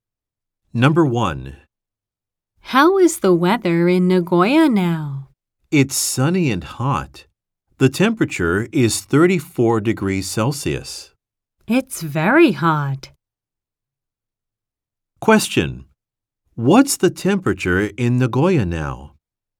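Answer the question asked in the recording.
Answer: 34 degrees Celsius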